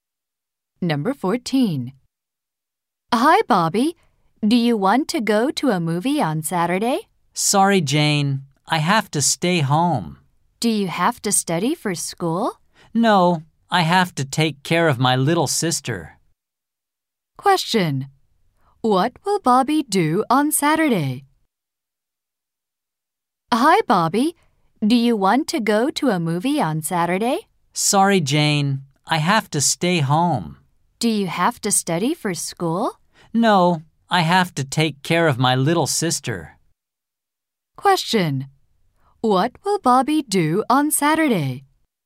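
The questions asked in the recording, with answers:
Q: Question. What will Bobby do on Saturday?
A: Take care of his little sister.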